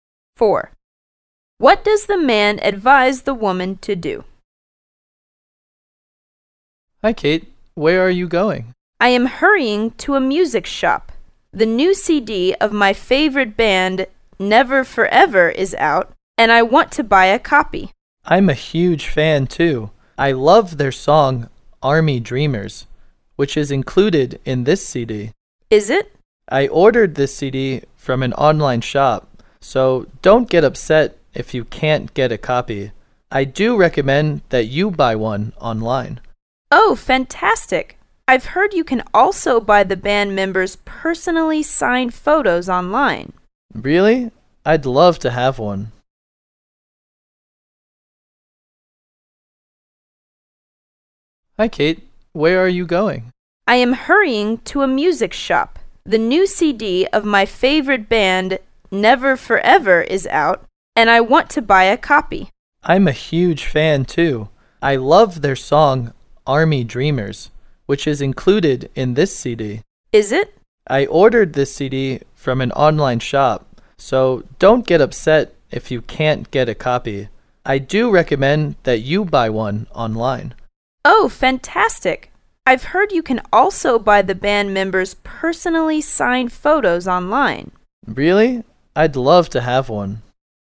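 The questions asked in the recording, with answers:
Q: What does the man advise the woman to do?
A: Buy the CD online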